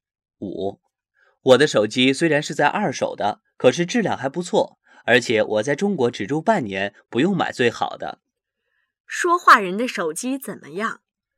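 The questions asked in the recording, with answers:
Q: 说话人的手机怎么样?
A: 是二手的,但质量还不错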